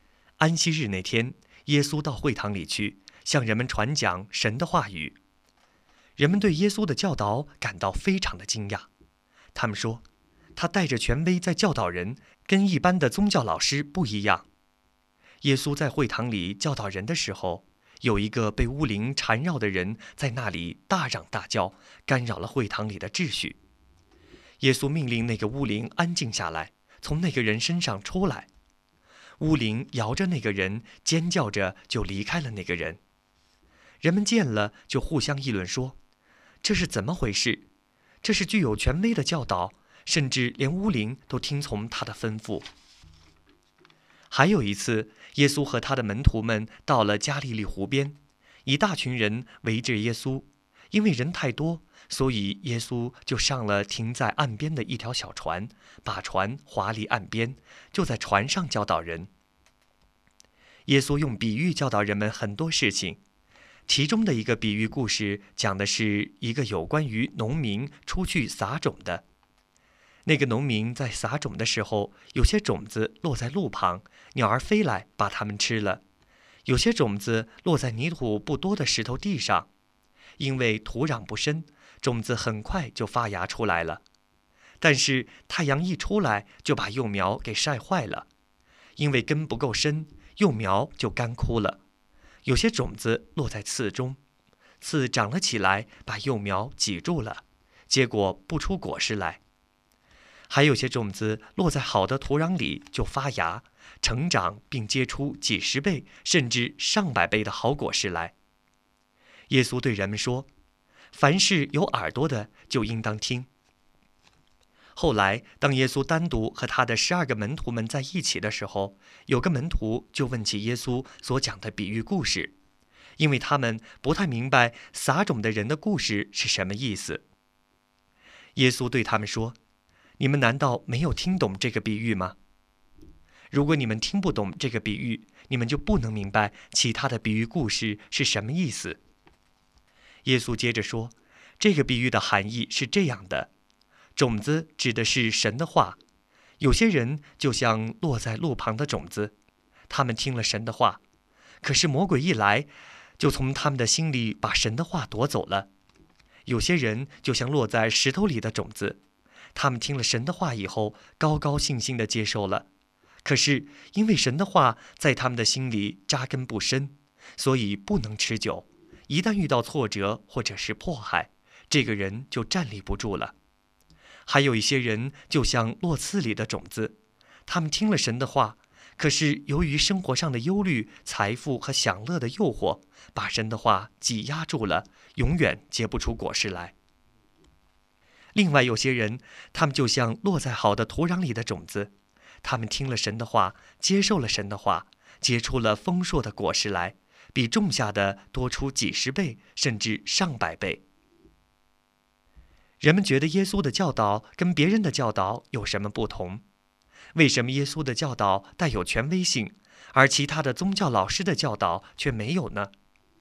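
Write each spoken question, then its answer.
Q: 人们觉得耶稣的教导跟别人的教导有什么不同?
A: 他带着权威在教导人,跟一般的宗教老师不一样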